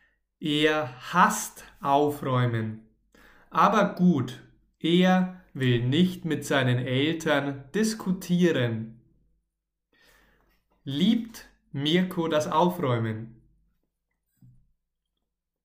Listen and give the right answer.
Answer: Nein, Mirko liebt nicht das Aufräumen.